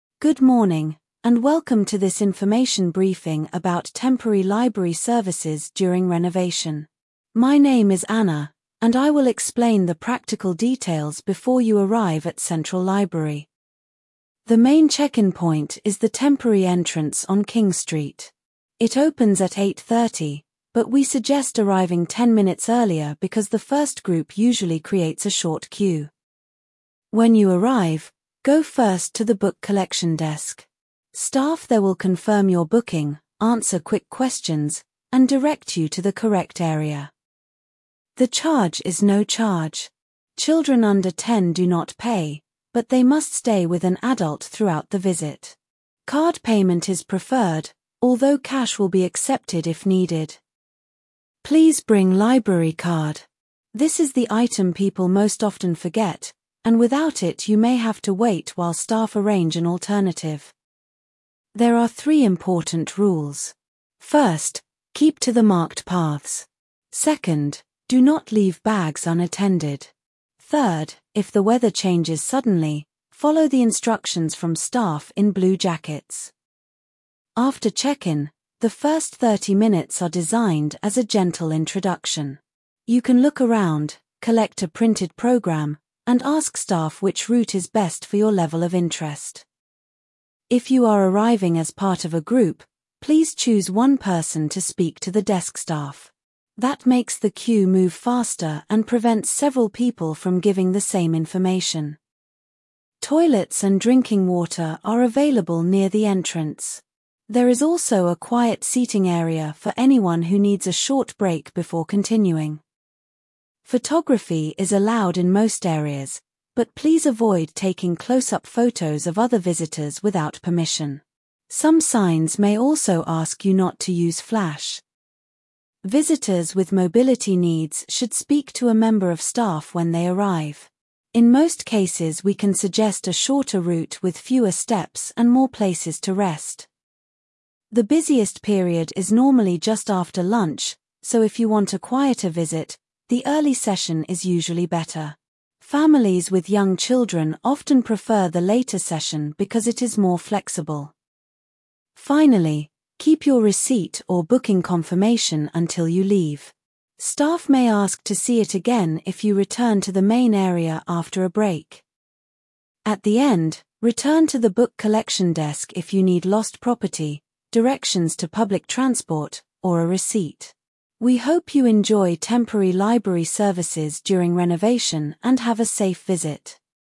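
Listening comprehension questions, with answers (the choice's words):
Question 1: What is the talk mainly about?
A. Temporary library services during renovation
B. A university lecture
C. A job interview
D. A sports result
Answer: Temporary library services during renovation

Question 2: Where is the main check-in point?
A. Inside the library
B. The temporary entrance on king street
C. Next to platform six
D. At the north car park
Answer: The temporary entrance on king street

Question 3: What time does check-in open?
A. Eight o'clock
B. Eight thirty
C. Three thirty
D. Six fifteen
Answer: Eight thirty

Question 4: Where should visitors go first?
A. The cafe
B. Book collection desk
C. The medical tent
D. The gift shop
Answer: Book collection desk

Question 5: How much is the charge?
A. Free for everyone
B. No charge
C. Twenty pounds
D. Thirty-five pounds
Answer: No charge

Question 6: What should visitors bring?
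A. Library card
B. A laptop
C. A passport photo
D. A bicycle lock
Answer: Library card

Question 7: Who gives instructions if the weather changes?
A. Staff in blue jackets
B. The police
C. Bus drivers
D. Ticket sellers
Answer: Staff in blue jackets

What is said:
Good morning, and welcome to this information briefing about temporary library services during renovation. My name is Anna, and I will explain the practical details before you arrive at Central Library.
The main check-in point is the temporary entrance on King Street. It opens at eight thirty, but we suggest arriving ten minutes earlier because the first group usually creates a short queue.
When you arrive, go first to the book collection desk. Staff there will confirm your booking, answer quick questions, and direct you to the correct area.
The charge is no charge. Children under ten do not pay, but they must stay with an adult throughout the visit. 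Card payment is preferred, although cash will be accepted if needed.
Please bring library card. This is the item people most often forget, and without it you may have to wait while staff arrange an alternative.
There are three important rules. First, keep to the marked paths. Second, do not leave bags unattended. Third, if the weather changes suddenly, follow the instructions from staff in blue jackets.
After check-in, the first thirty minutes are designed as a gentle introduction. You can look around, collect a printed programme, and ask staff which route is best for your level of interest.
If you are arriving as part of a group, please choose one person to speak to the desk staff. That makes the queue move faster and prevents several people from giving the same information.
Toilets and drinking water are available near the entrance. There is also a quiet seating area for anyone who needs a short break before continuing.
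Photography is allowed in most areas, but please avoid taking close-up photos of other visitors without permission. Some signs may also ask you not to use flash.
Visitors with mobility needs should speak to a member of staff when they arrive. In most cases we can suggest a shorter route with fewer steps and more places to rest.
The busiest period is normally just after lunch, so if you want a quieter visit, the early session is usually better. Families with young children often prefer the later session because it is more flexible.
Finally, keep your receipt or booking confirmation until you leave. Staff may ask to see it again if you return to the main area after a break.
At the end, return to the book collection desk if you need lost property, directions to public transport, or a receipt. We hope you enjoy temporary library services during renovation and have a safe visit.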